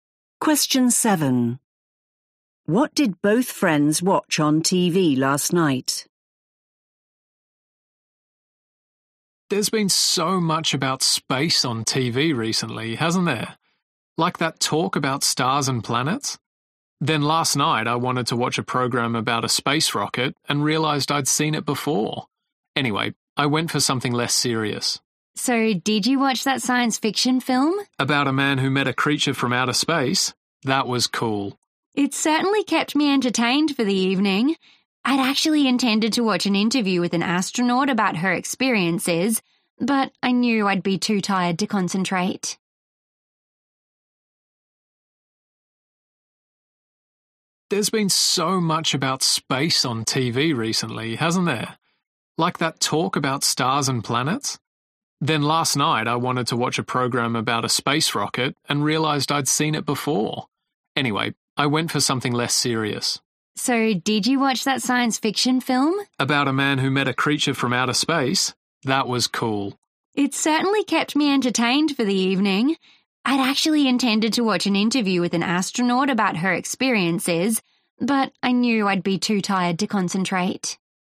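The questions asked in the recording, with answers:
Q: What did both friends watch on TV last night?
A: a science fiction film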